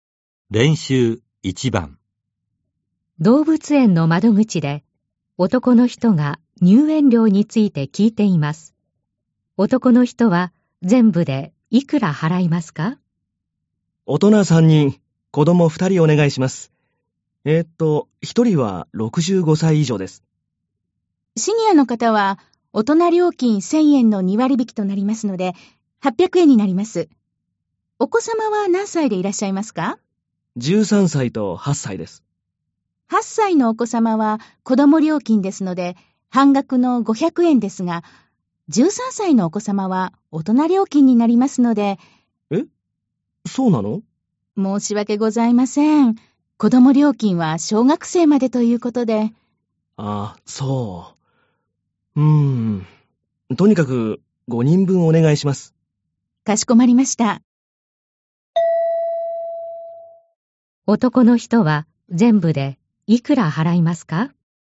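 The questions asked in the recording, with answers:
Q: 男の人は全部でいくら払いますか?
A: 4300円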